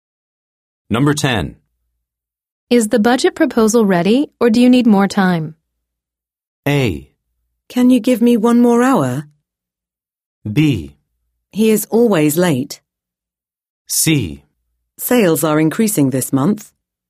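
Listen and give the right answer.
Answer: A: Can you give me one more hour?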